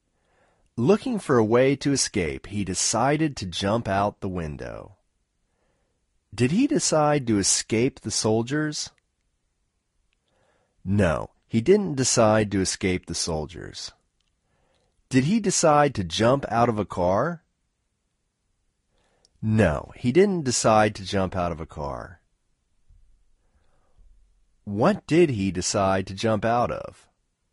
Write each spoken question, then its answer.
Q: What did he decide to jump out of?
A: He decided to jump out of a window.